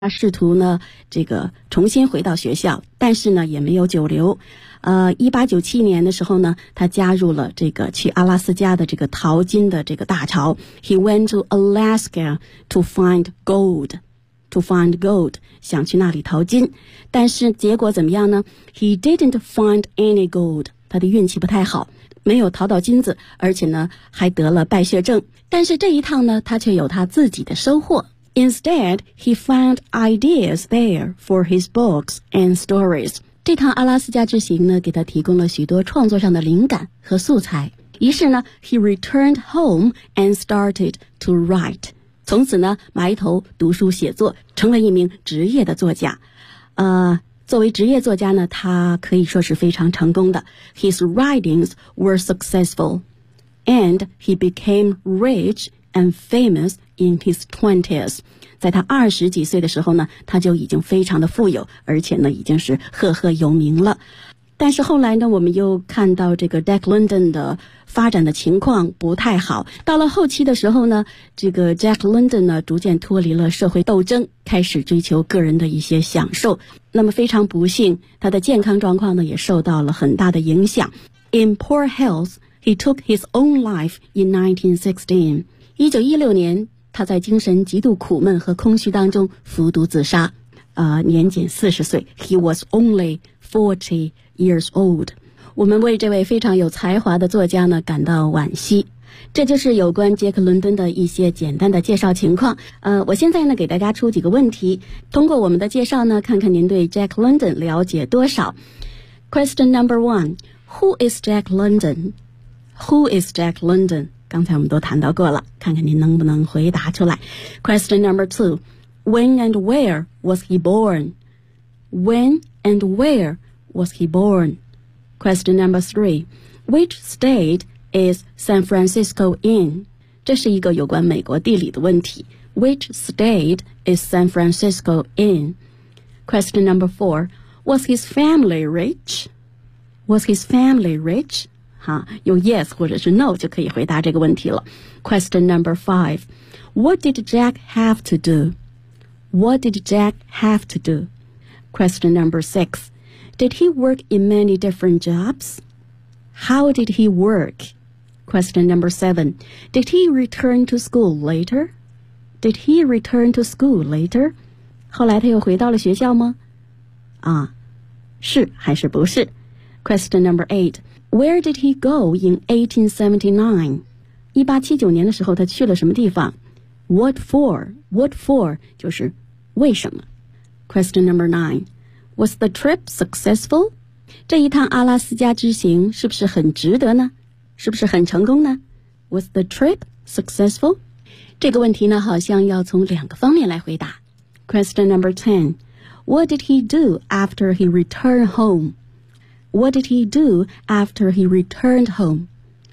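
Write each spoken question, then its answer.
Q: Did he return to school later?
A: Yes, he tried to go back to school, but he didn't stay long.

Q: Where did he go in 1879?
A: He went to Alaska to find gold.

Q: Was the trip successful?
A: No, he didn't find any gold, but he found ideas for his books and stories.

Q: What did he do after he returned home?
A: He started to write.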